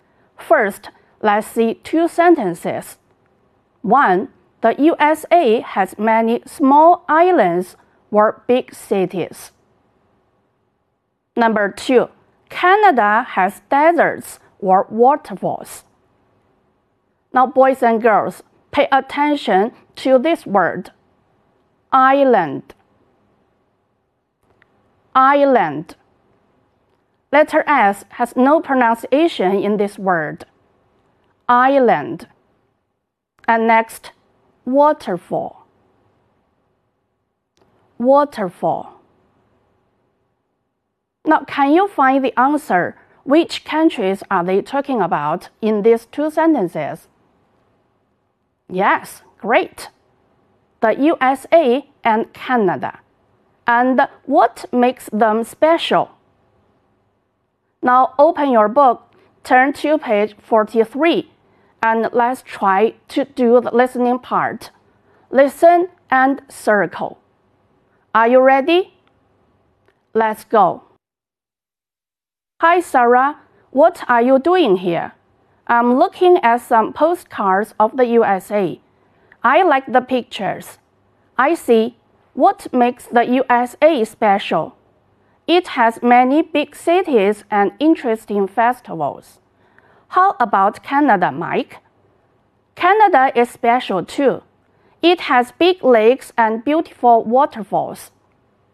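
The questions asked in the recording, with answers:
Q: One, the USA has many small islands.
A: big cities

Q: Number two, Canada has deserts or waterfalls.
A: waterfalls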